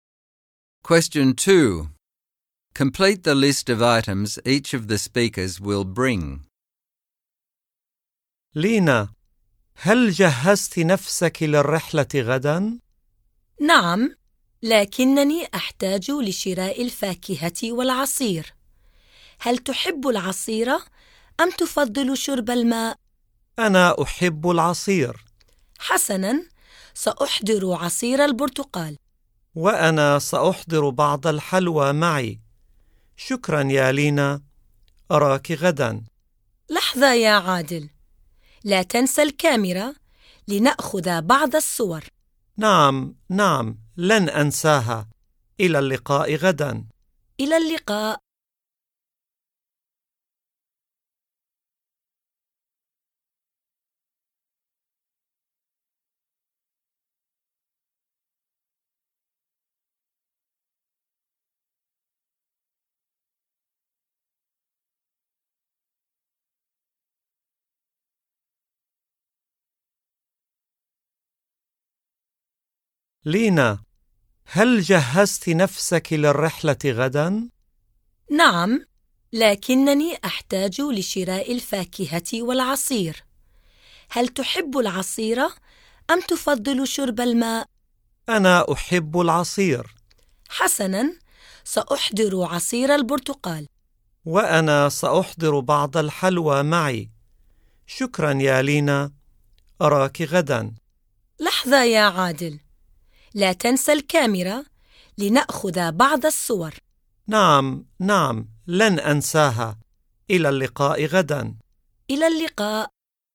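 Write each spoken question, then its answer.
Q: Complete the list of items each of the speakers will bring.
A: Adel: orange juice and the camera; Lina: some sweets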